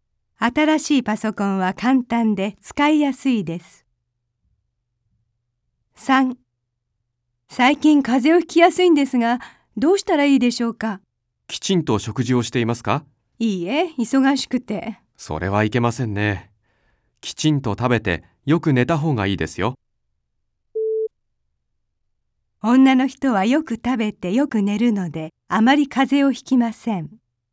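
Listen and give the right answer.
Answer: ×(正しくない)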